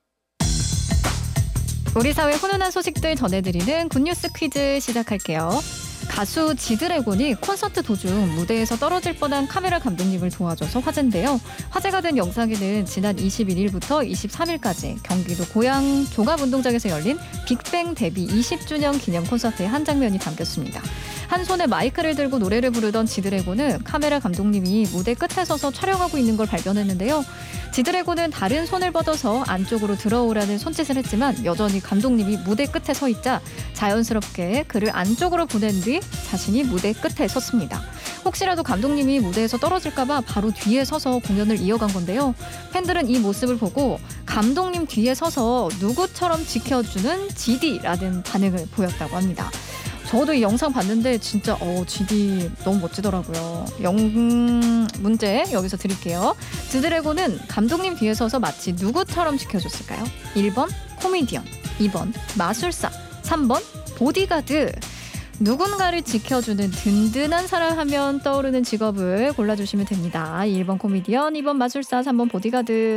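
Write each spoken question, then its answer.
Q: 지드래곤은 감독님 뒤에 서서 마치 누구처럼 지켜줬을까요?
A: 3: 보디가드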